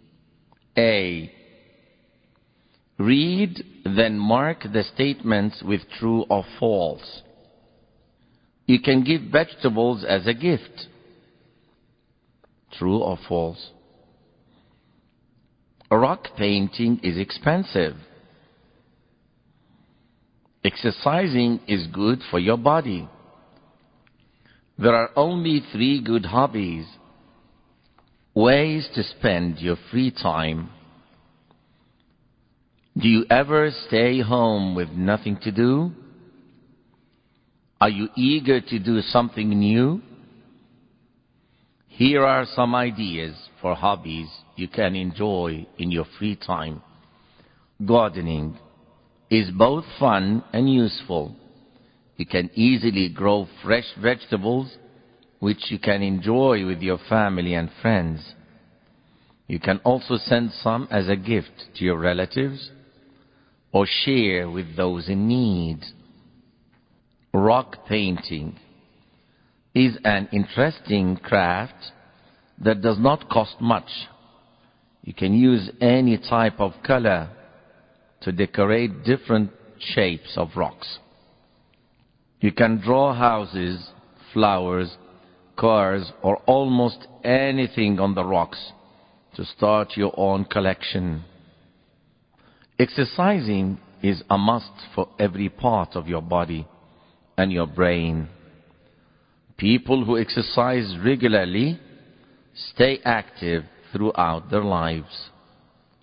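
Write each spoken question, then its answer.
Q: You can give vegetables as a gift.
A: True

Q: Rock painting is expensive.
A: False

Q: Exercising is good for your body.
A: True

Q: There are only 3 good hobbies.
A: False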